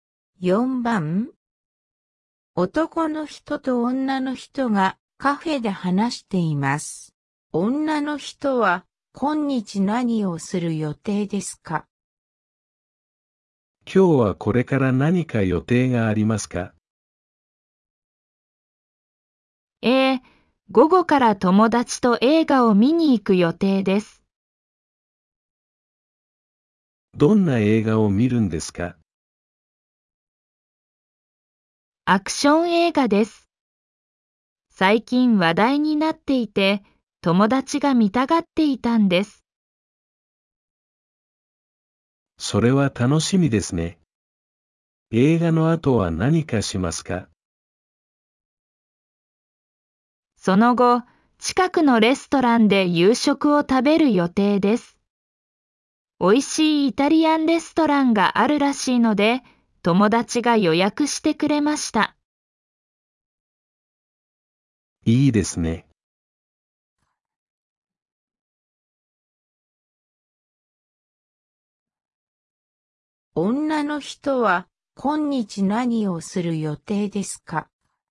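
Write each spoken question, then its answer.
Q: 女の人は今日何をする予定ですか?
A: 友達と映画を見て、その後レストランで夕食を食べる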